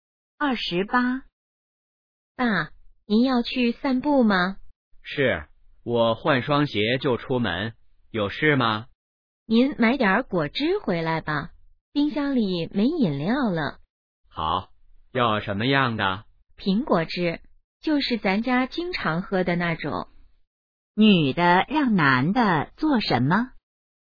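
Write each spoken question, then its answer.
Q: 女的让男的做什么?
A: 买苹果汁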